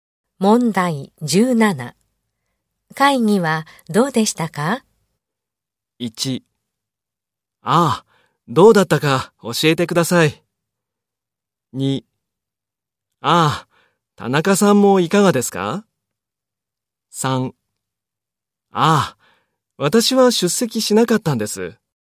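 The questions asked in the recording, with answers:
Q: 会議はどうでしたか?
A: 2: ああ、私は出席しなかったんです。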